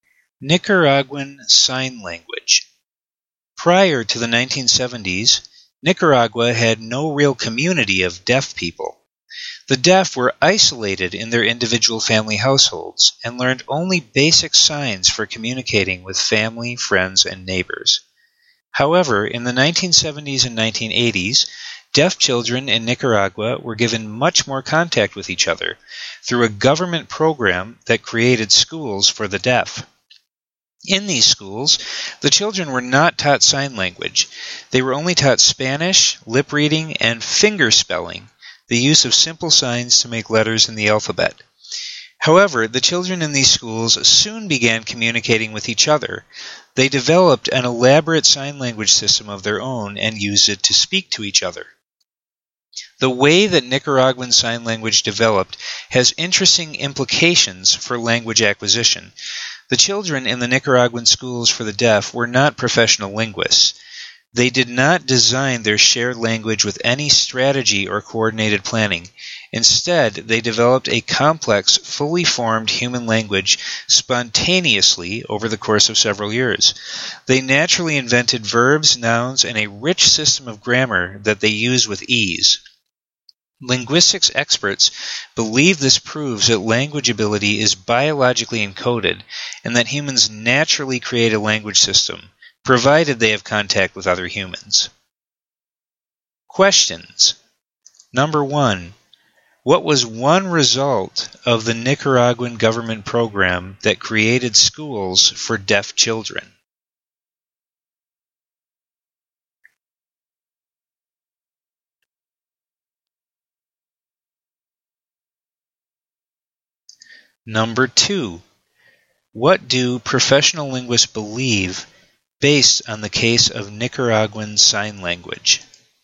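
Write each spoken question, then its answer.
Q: What was one result of the Nicaraguan government program that created schools for deaf children?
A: Deaf children had contact with each other and developed their own sign language.

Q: What do professional linguists believe based on the case of Nicaraguan Sign Language?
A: Language ability is biologically encoded; humans naturally create language when in contact with others.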